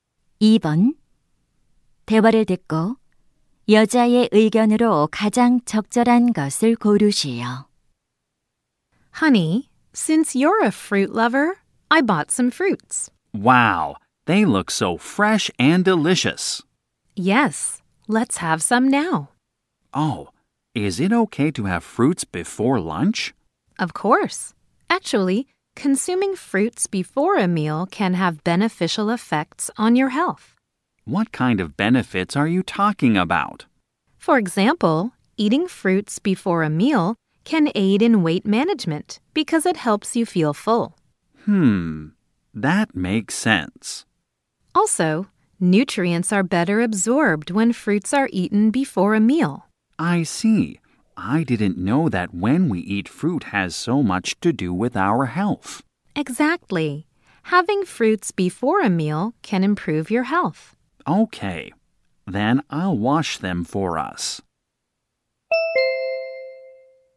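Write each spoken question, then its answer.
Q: 대화를 듣고 여자의 의견으로 가장 적절한 것을 고르시오.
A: 식사 전에 과일을 먹으면 건강에 좋다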